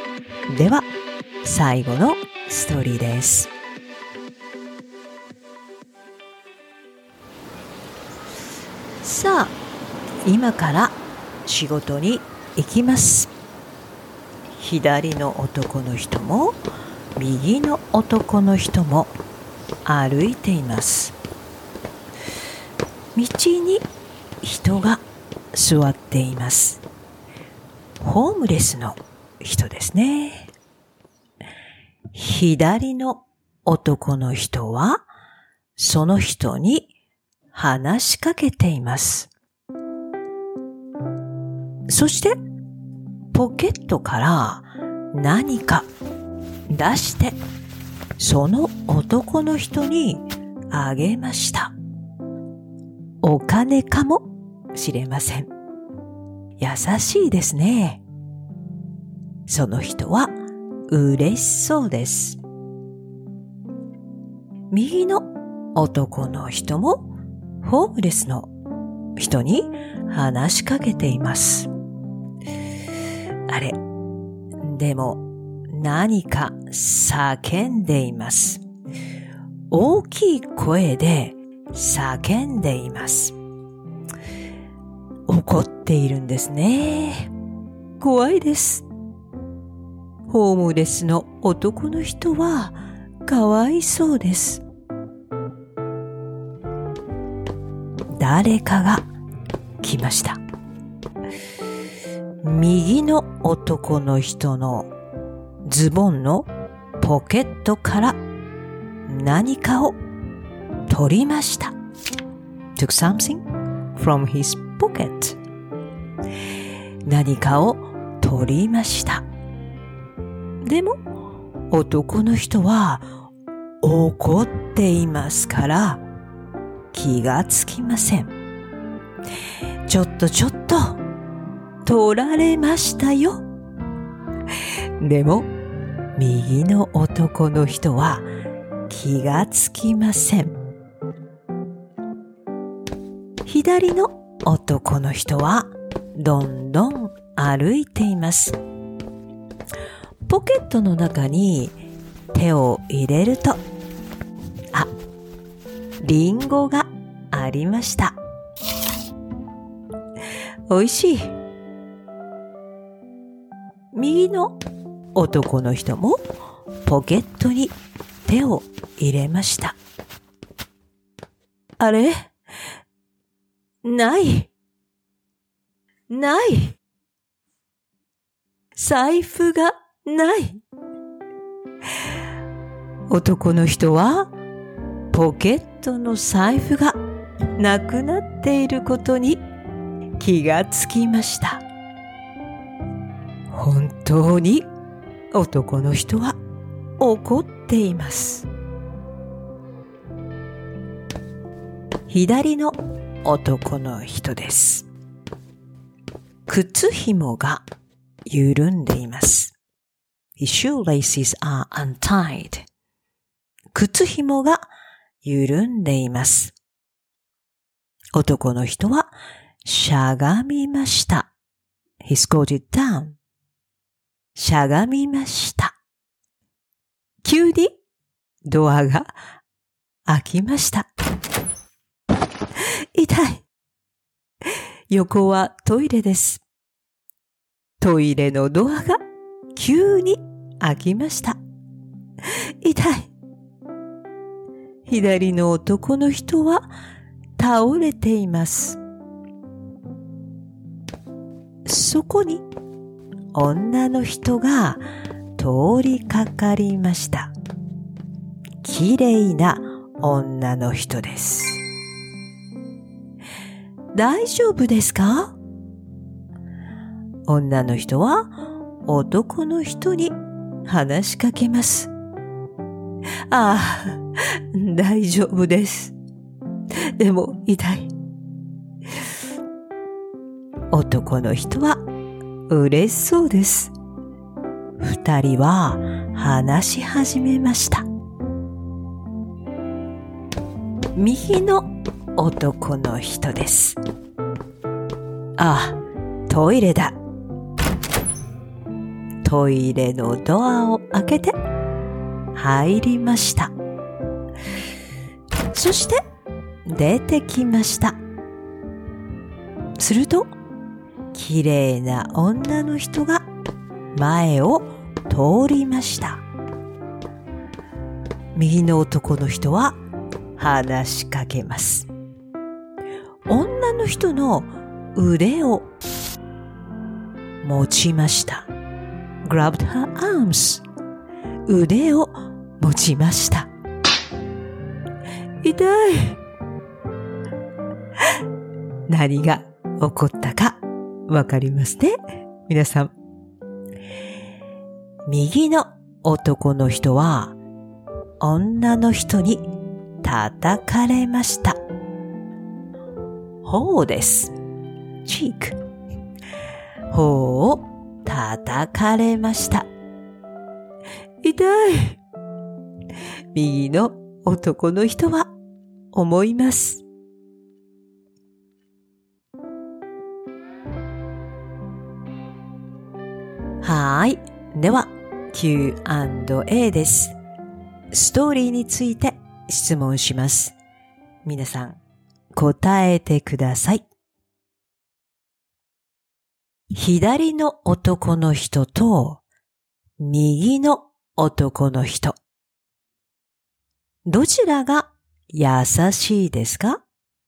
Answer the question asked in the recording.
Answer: 左の男の人です。